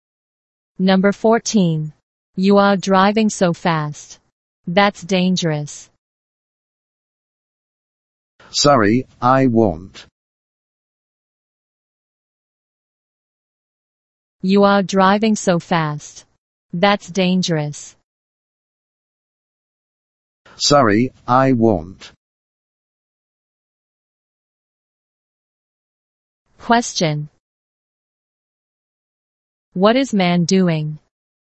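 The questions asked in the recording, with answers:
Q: What is man doing?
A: Driving too fast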